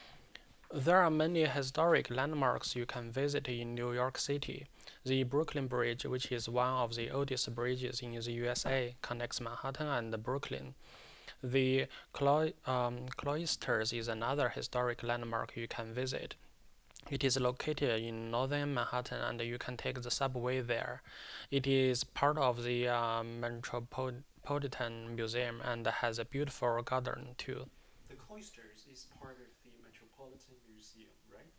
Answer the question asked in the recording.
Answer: Yes, it is part of the Metropolitan Museum.